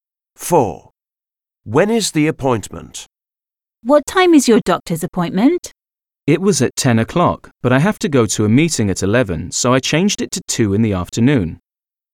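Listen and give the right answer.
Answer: At 2 in the afternoon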